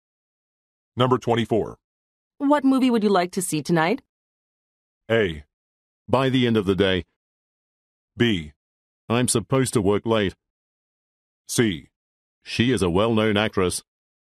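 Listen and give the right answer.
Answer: B: I'm supposed to work late.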